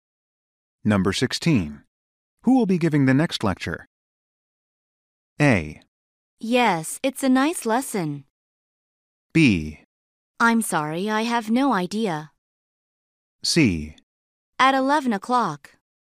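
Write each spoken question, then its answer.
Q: Who will be giving the next lecture?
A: B: I'm sorry, I have no idea.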